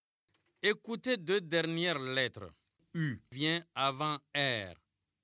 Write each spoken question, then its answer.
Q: U vient avant R.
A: Monsieur, je ne me suis pas levé.